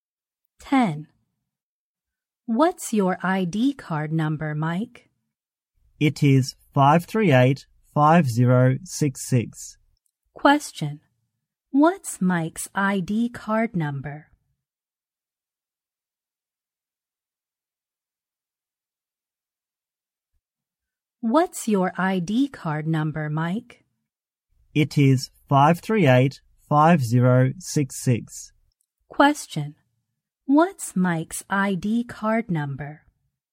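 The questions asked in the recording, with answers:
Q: What's Mike's ID card number?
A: 538-5066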